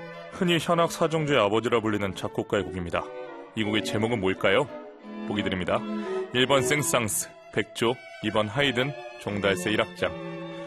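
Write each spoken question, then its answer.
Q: 이 곡의 제목은 뭘까요?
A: 2번: 하이든, 종달새 1악장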